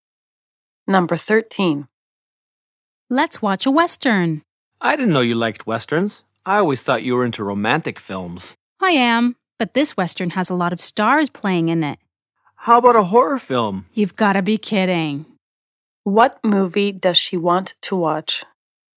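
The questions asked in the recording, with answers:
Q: What movie does she want to watch?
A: a Western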